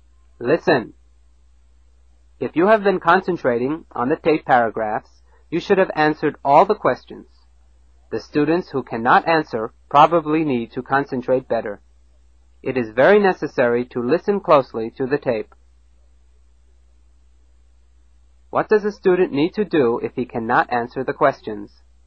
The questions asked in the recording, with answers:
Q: What does a student need to do if he cannot answer the questions?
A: He needs to listen closely.